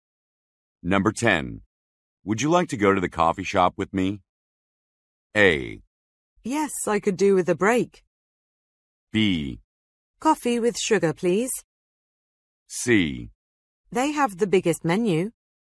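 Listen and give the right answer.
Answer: A: Yes, I could do with a break.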